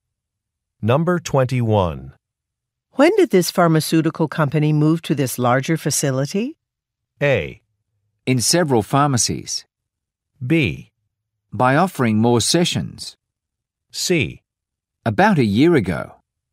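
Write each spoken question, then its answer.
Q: When did this pharmaceutical company move to this larger facility?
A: C: About a year ago.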